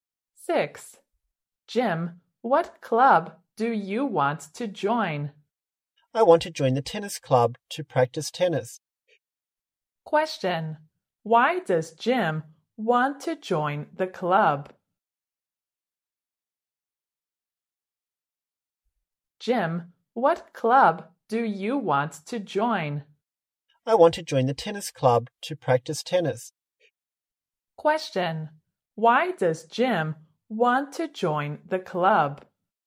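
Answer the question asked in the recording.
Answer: To practice tennis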